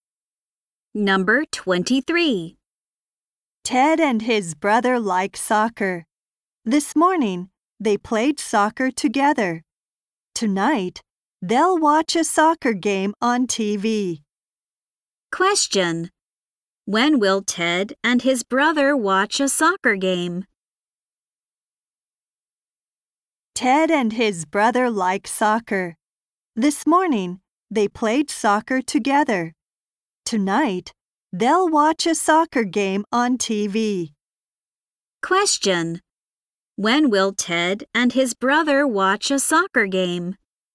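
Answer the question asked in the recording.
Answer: Tonight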